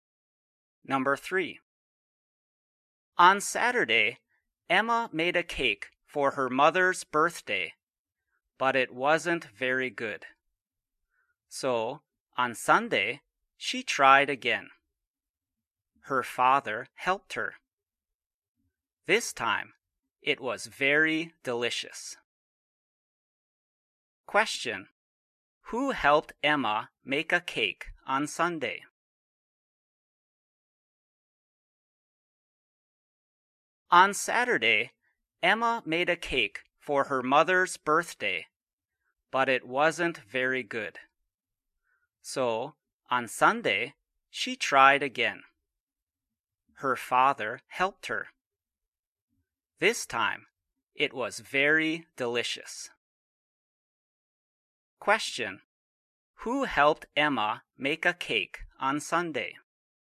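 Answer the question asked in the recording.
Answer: Her father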